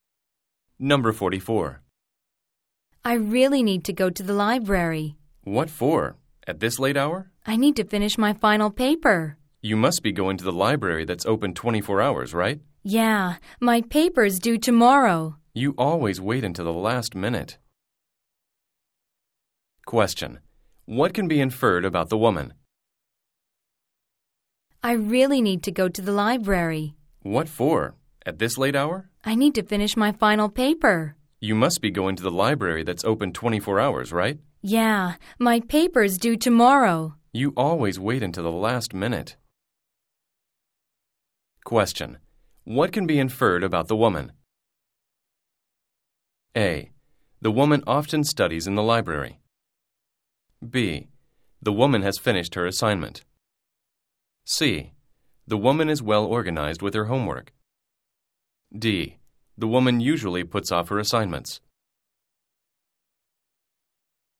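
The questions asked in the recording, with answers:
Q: What can be inferred about the woman?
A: D: The woman usually puts off her assignments.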